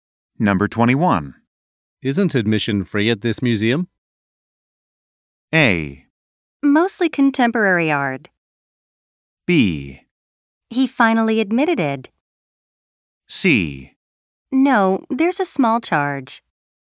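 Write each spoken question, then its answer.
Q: Isn't admission free at this museum?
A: C: No, there's a small charge.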